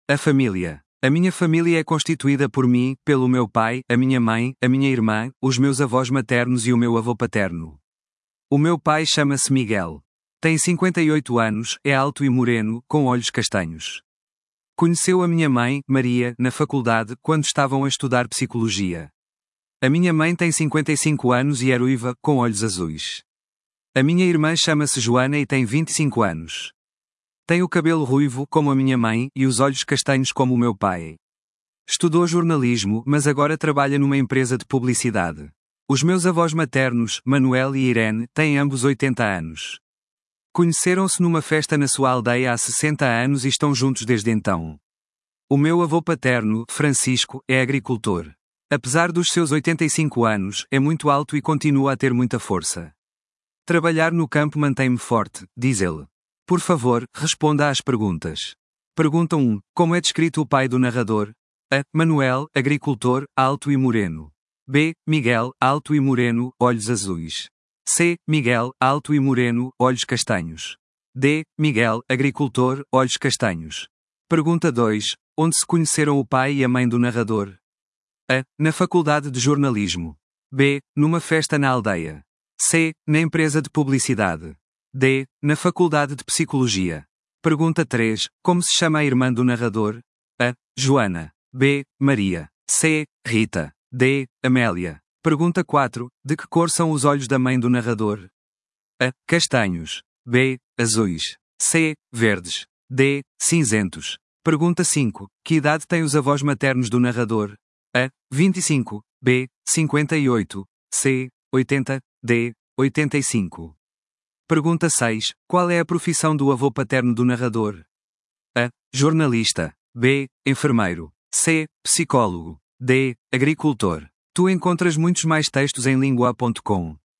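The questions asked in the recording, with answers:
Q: Como é descrito o pai do narrador?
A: C: Miguel, alto e moreno, olhos castanhos.

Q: Onde se conheceram o pai e a mãe do narrador?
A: D: Na faculdade de psicologia.

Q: Como se chama a irmã do narrador?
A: A: Joana.

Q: De que cor são os olhos da mãe do narrador?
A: B: Azuis.

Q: Que idade têm os avós maternos do narrador?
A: C: 80.

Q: Qual é a profissão do avô paterno do narrador?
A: D: Agricultor.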